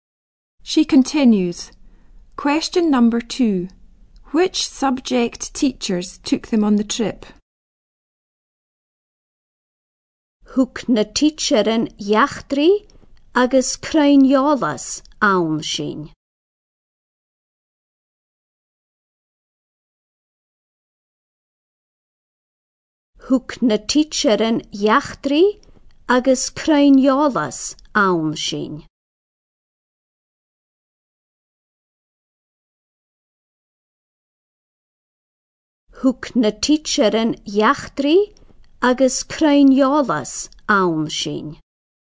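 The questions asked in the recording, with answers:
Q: Which subject teachers took them on the trip?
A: History and geography teachers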